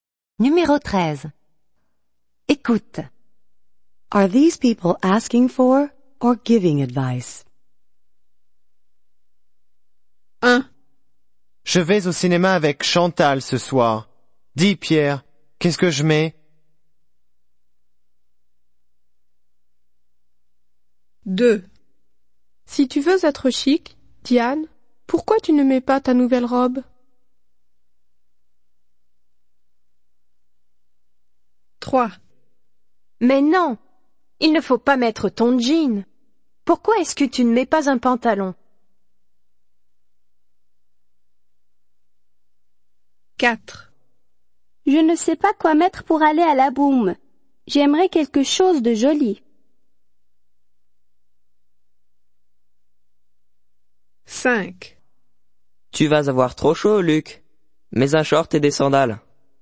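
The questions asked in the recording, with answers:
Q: Are these people asking for or giving advice?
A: asking for advice

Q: Are these people asking for or giving advice?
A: giving advice

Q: Are these people asking for or giving advice?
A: giving advice

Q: Are these people asking for or giving advice?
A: asking for advice

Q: Are these people asking for or giving advice?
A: giving advice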